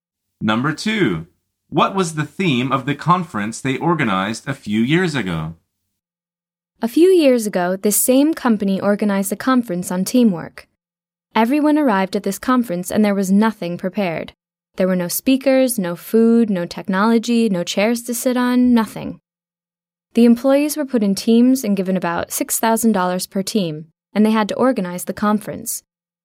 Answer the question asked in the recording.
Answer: The answer is teamwork.